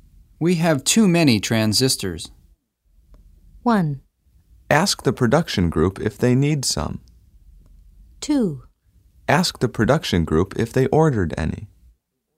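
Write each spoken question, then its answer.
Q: We have too many transistors.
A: 1: Ask the production group if they need some.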